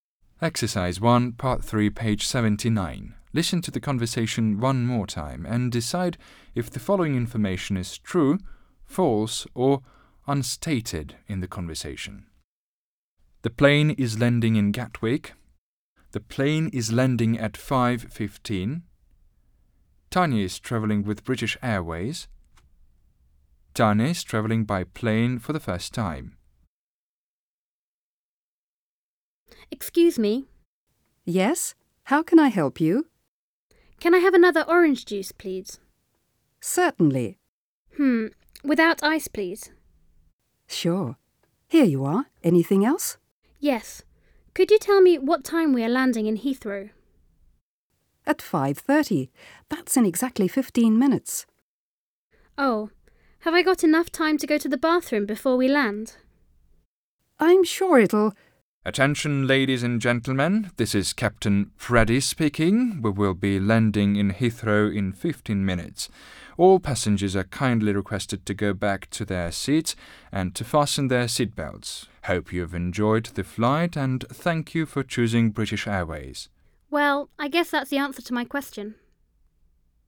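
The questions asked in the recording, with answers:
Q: The plane is landing in Gatwick.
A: False

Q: The plane is landing at 5:15.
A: False

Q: Tanya is travelling with British Airways.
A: True

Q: Tanya is travelling by plane for the first time.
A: Unstated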